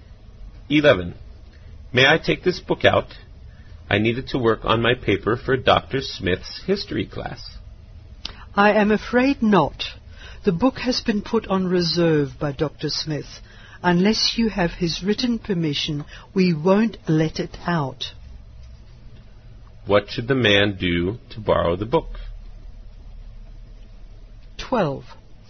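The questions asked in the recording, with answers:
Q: What should the man do to borrow the book?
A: Get Dr. Smith's written permission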